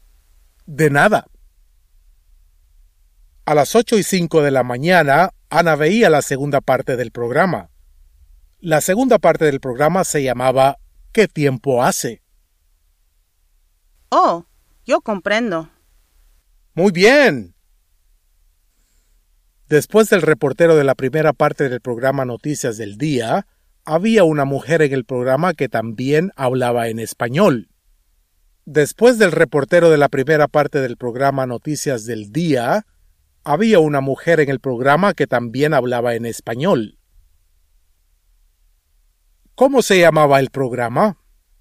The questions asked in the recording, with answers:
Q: ¿Cómo se llamaba el programa?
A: Noticias del Día.